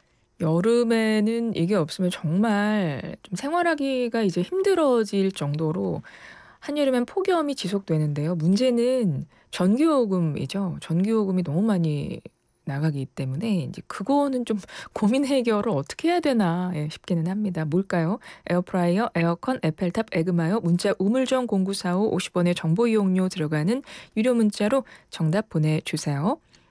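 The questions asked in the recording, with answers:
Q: 뭘까요? 에어프라이어, 에어컨, 에펠탑, 에그마요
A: 에어컨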